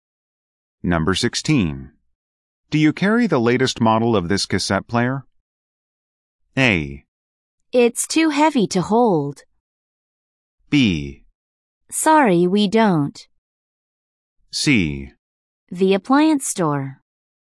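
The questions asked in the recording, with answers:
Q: Do you carry the latest model of this cassette player?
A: B: Sorry, we don't.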